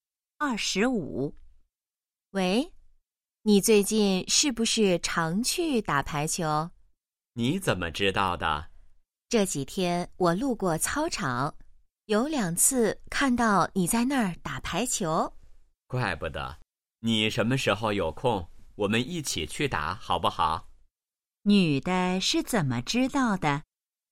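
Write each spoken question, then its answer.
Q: 女的是怎么知道的?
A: 路过操场时看到他在打排球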